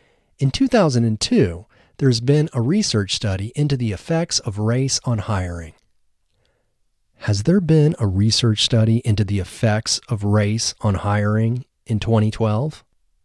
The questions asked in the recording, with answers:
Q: Has there been a research study into the effects of race on hiring in 2012?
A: No. There hasn't been a research study into the effects of race on hiring in 2012.